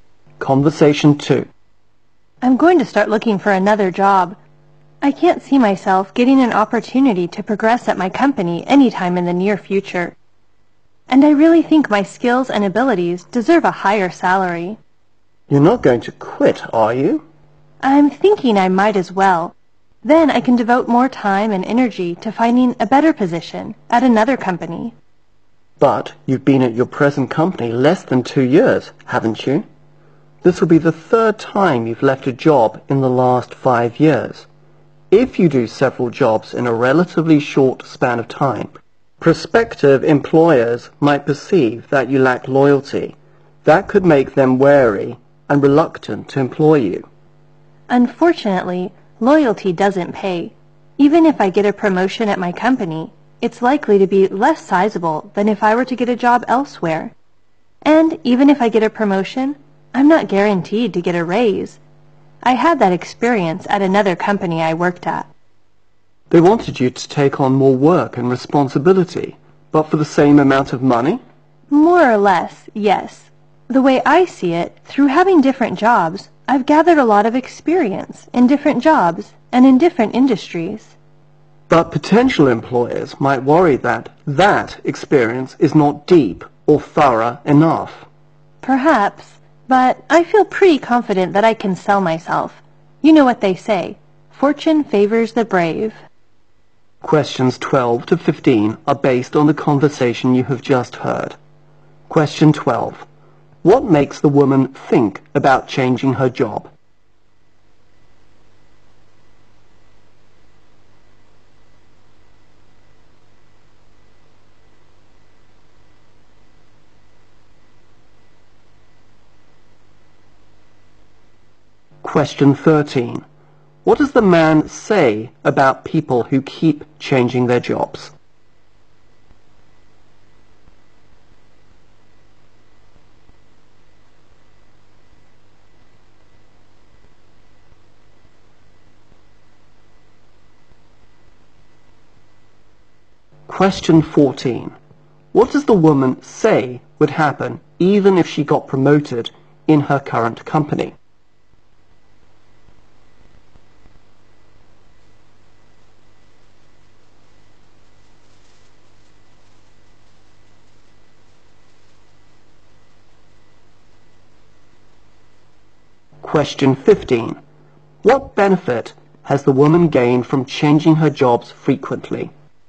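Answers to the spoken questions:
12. No chance of progress soon; she deserves a higher salary
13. Employers might think they lack loyalty
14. She wouldn't be guaranteed a raise
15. Experience in different jobs and industries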